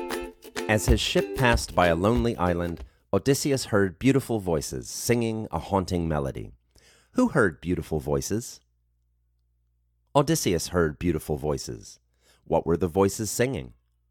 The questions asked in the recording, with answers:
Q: Who heard beautiful voices?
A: Odysseus heard beautiful voices.

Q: What were the voices singing?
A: The voices were singing a haunting melody.